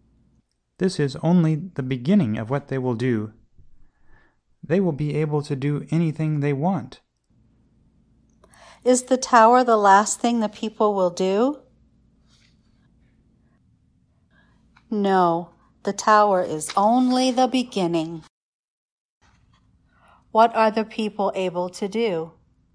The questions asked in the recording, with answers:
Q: What are the people able to do?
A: The people are able to do anything they want.